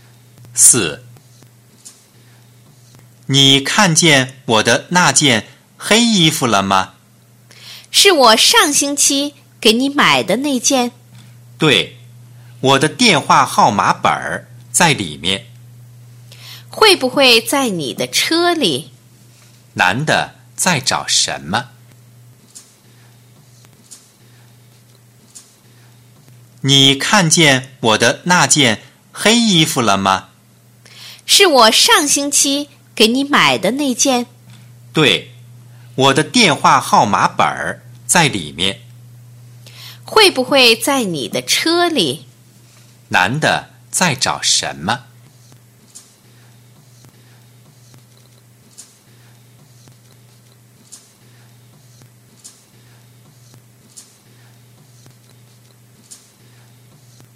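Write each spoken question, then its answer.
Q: 男的在找什么?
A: 电话号码本儿(在黑衣服里)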